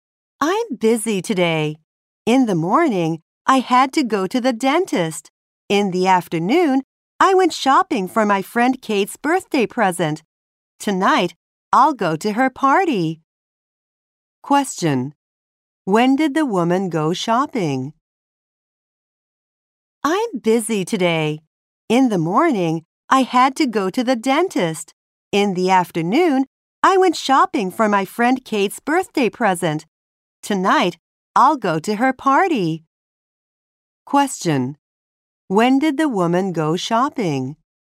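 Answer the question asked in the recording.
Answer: In the afternoon.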